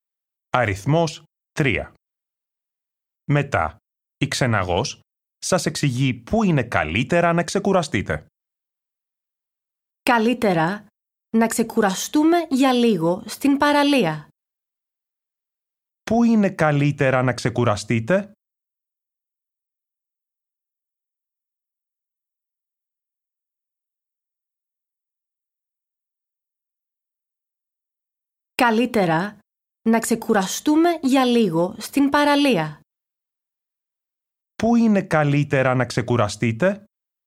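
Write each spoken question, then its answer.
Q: Πού είναι καλύτερα να ξεκουραστείτε?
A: στην παραλία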